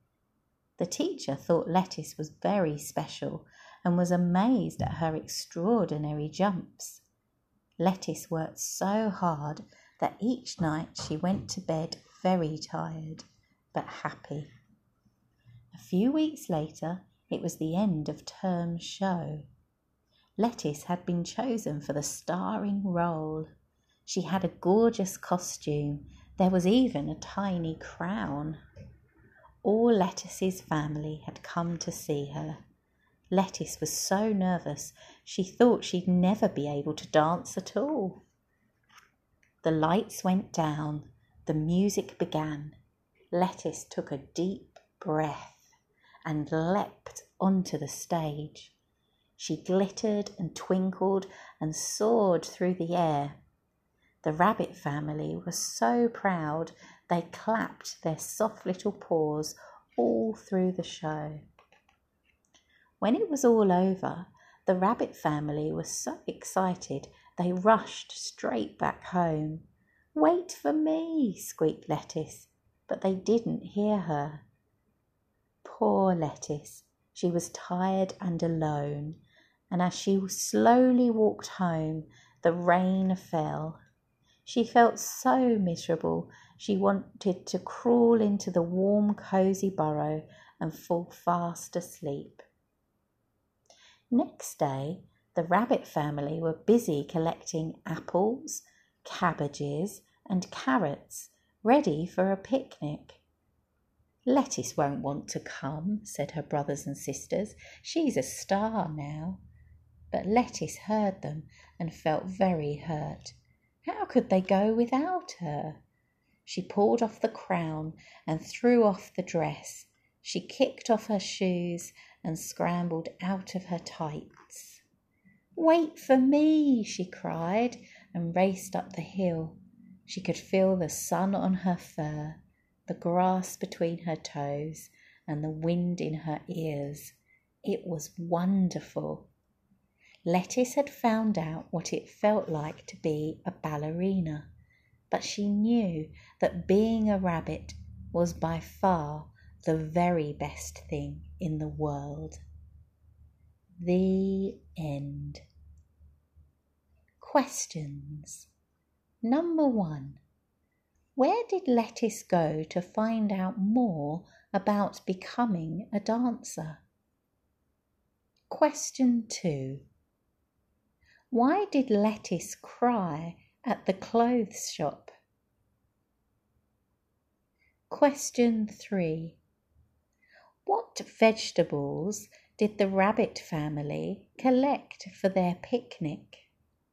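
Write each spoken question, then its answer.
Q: What vegetables did the rabbit family collect for their picnic?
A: Apples, cabbages and carrots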